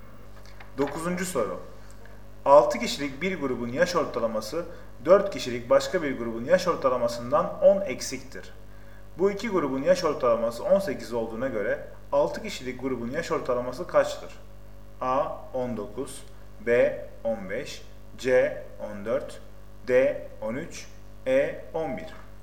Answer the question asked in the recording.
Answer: Doğru cevap C 14.